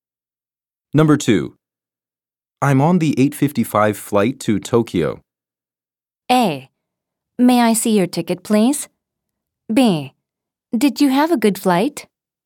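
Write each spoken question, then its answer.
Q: I'm on the 855 flight to Tokyo.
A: A: May I see your ticket, please?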